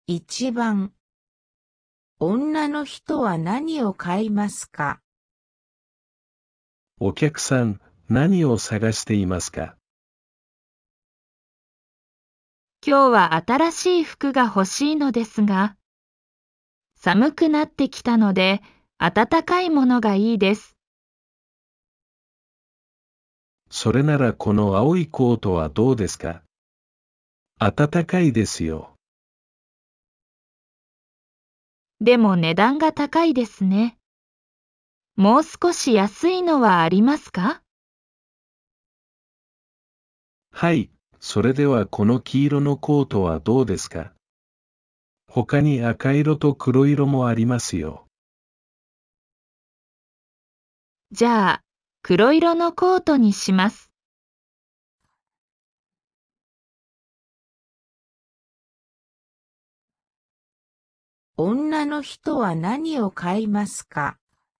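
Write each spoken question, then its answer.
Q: 女の人は何を買いますか?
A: 黒色のコート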